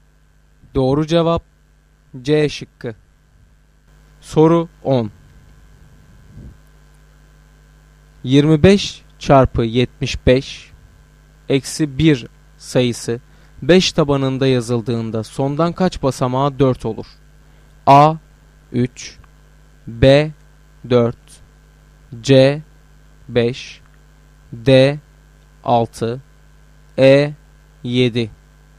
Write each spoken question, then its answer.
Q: 25 çarpı 75 eksi 1 sayısı 5 tabanında yazıldığında sondan kaç basamağa 4 olur?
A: Doğru cevap B şıkkı.